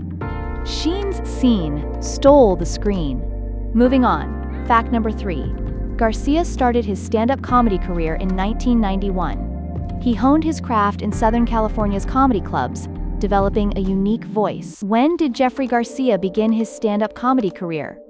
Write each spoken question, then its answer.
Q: When did Jeffrey Garcia begin his stand-up comedy career?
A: Correct answer, 1991.